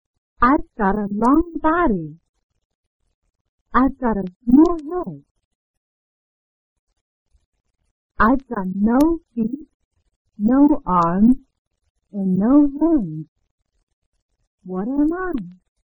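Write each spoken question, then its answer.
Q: What am I?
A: a snake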